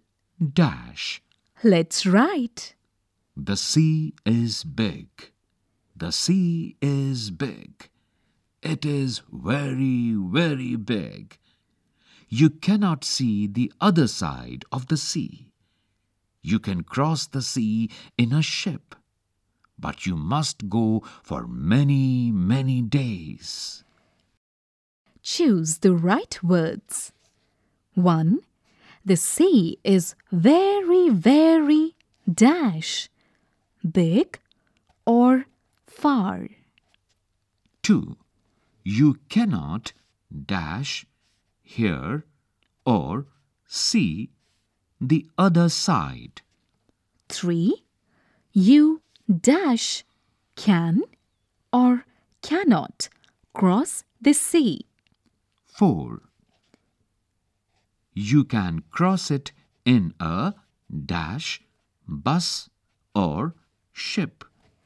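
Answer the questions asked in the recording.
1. big
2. see
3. can
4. ship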